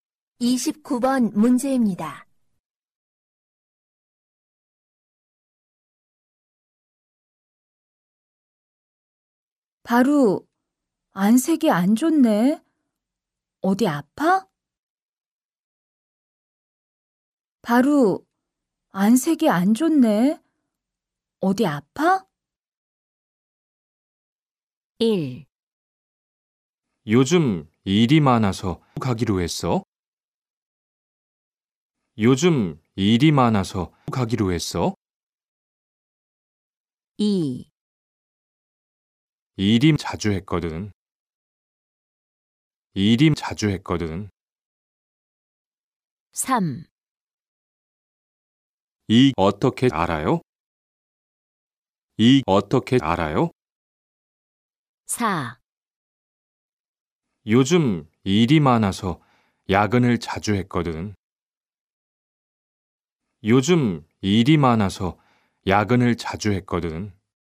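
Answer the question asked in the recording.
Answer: 4: 요즘 일이 많아서 야근을 자주 했거든.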